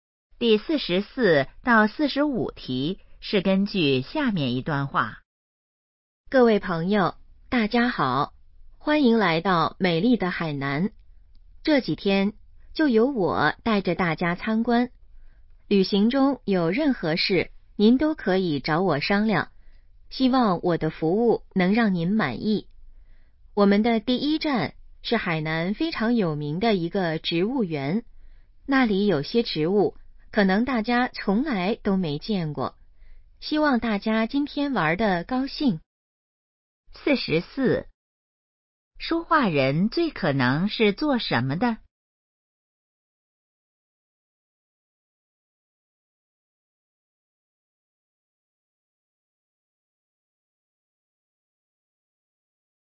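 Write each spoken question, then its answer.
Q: 说话人最可能是做什么的?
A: 导游

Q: 关于那个植物园,下列哪个正确?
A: 很有名,有些植物大家没见过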